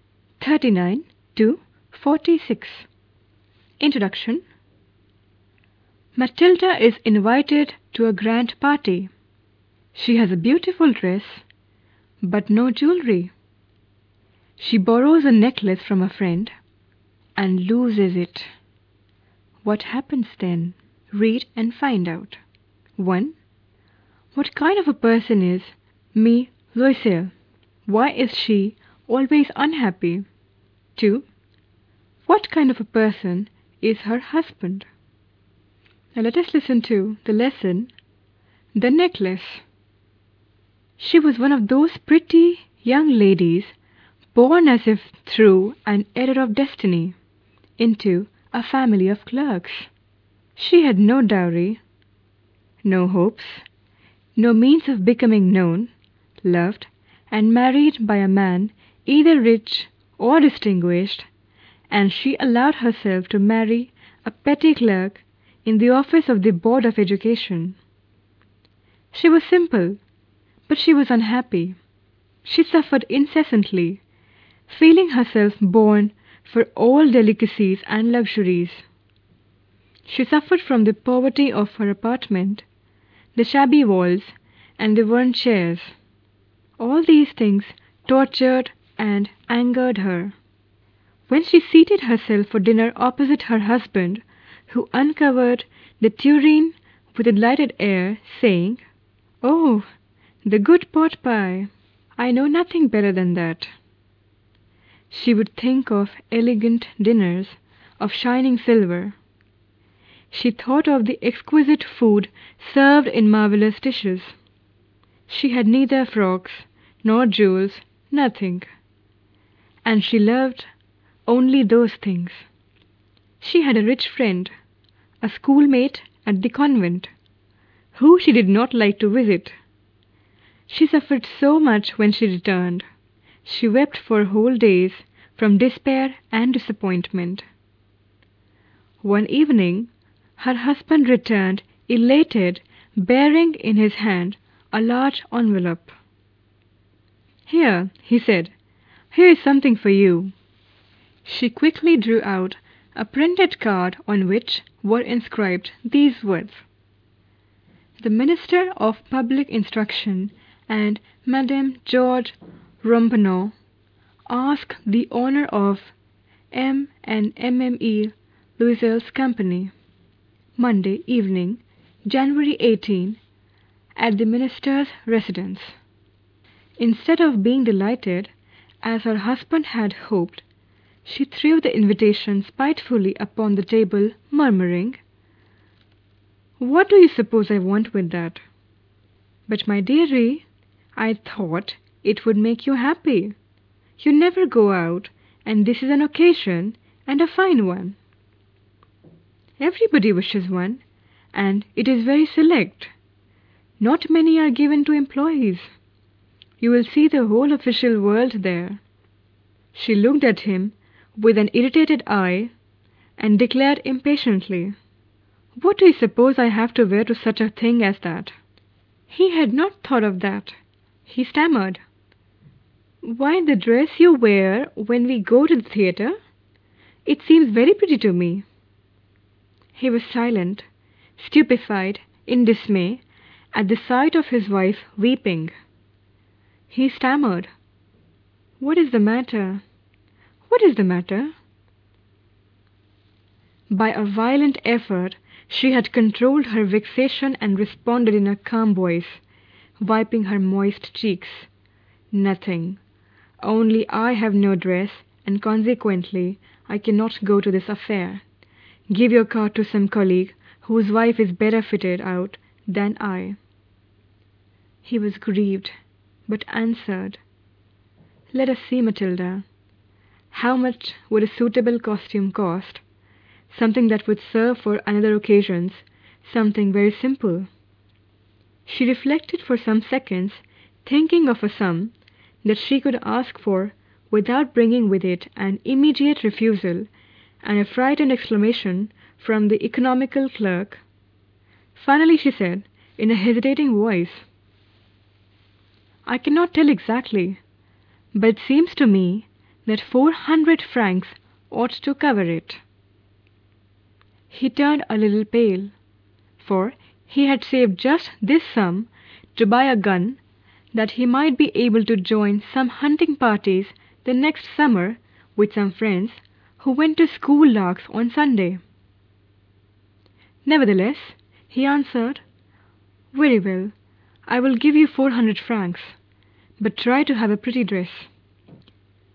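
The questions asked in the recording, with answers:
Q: Why is she always unhappy?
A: She feels she was born for luxuries but married a poor clerk and lives in poverty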